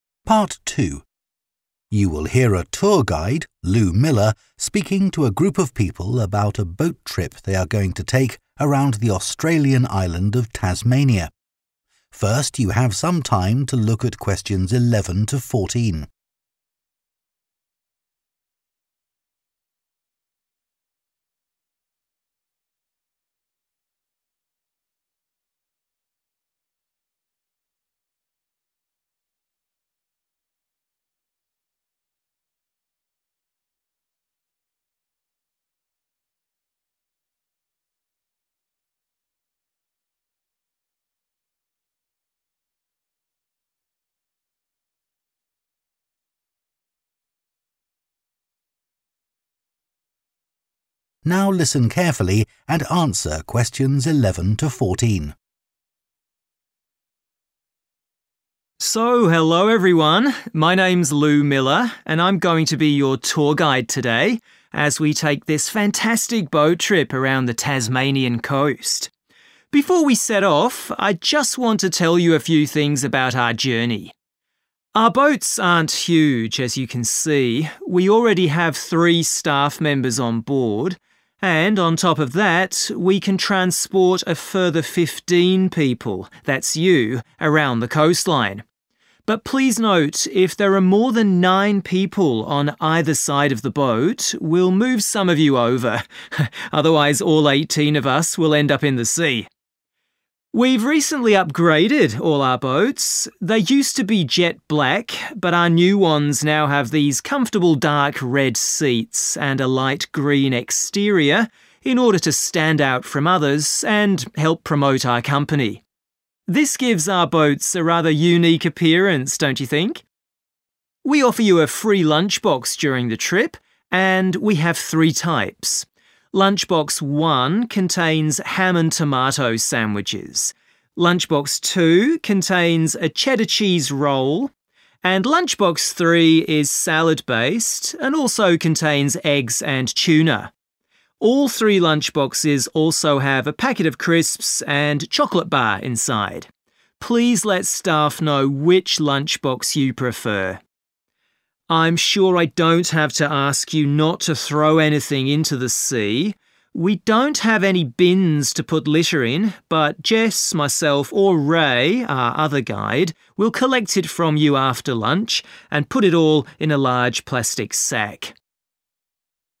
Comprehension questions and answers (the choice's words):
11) What is the maximum number of people who can stand on each side of the boat?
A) 9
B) 15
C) 18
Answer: 9

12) What colour are the tour boats?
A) dark red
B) jet black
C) light green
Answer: light green

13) Which lunchbox is suitable for someone who doesn't eat meat or fish?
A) Lunchbox 1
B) Lunchbox 2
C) Lunchbox 3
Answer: Lunchbox 2

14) What should people do with their litter?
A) take it home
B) hand it to a member of staff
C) put it in the bins provided on the boat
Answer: hand it to a member of staff

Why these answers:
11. Câu hỏi yêu cầu thí sinh nghe số người tối đa có thể đứng trên mỗi bên của con thuyền. Người nói chỉ ra rằng nếu số người vượt quá 9 trên mỗi bên thì sẽ phải di chuyển bớt người để tránh tình trạng chìm thuyền. Do đó, đáp án chính xác là A: 9.
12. Câu hỏi yêu cầu thí sinh nghe về màu sắc của các thuyền du lịch. Người nói đề cập rằng thuyền cũ có màu đen, nhưng các thuyền mới có ghế màu đỏ sẫm và vỏ ngoài màu xanh lá nhạt. Vì vậy, đáp án đúng là C, vì màu này hiện tại mới được sử dụng.
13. Câu hỏi hỏi về các loại hộp ăn trưa miễn phí mà thí sinh sẽ nhận được. Người nói đã liệt kê ba loại hộp ăn trưa, và rõ ràng hộp ăn trưa thứ hai chứa một cuộn phô mai cheddar. Do đó, đáp án chính xác là B.
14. Câu hỏi yêu cầu nghe về cách xử lý rác thải trong chuyến đi. Mặc dù có đề cập đến từ "bins" trong câu, người nói cho biết rằng không có thùng rác để sử dụng, vì vậy đáp án C bị loại bỏ. Người nói tiếp tục nói về việc thu thập rác từ các nhân viên Jess, Ray, và các nhân viên khác, điều này chứng minh rằng đáp án B là chính xác.